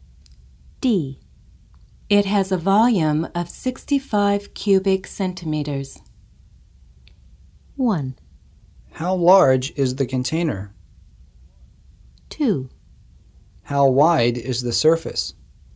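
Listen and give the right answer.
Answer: 1: How large is the container?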